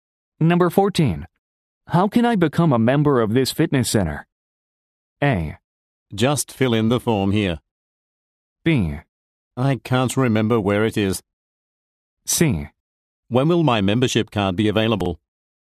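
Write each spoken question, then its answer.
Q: How can I become a member of this fitness center?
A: A: Just fill in the form here.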